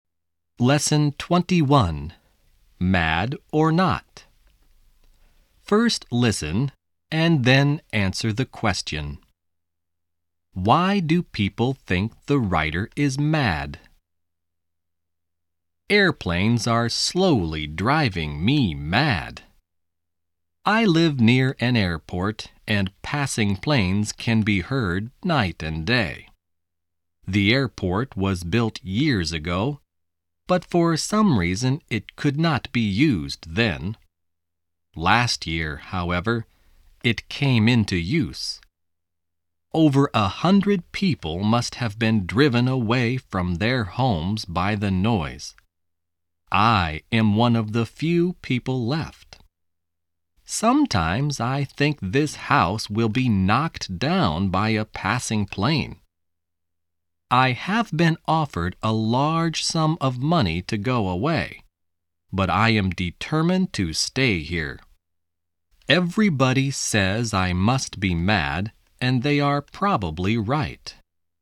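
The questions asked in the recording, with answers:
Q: Why do people think the writer is mad?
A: Because he is determined to stay in his house near the noisy airport even though he has been offered a large sum of money to go away.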